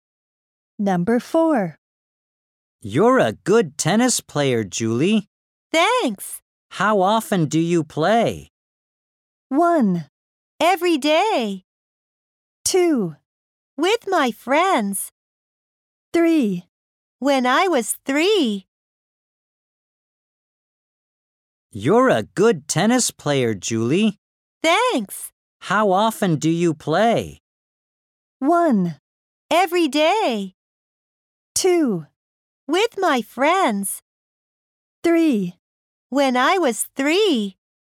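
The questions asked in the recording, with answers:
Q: How often do you play?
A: 1: Every day.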